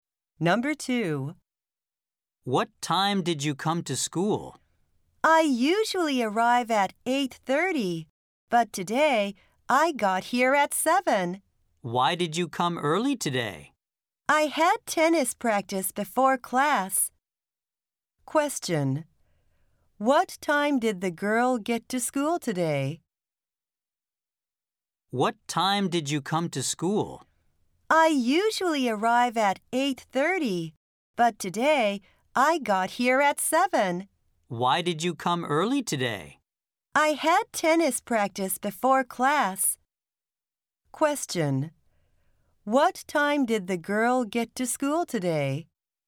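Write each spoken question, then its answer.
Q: What time did the girl get to school today?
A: At 7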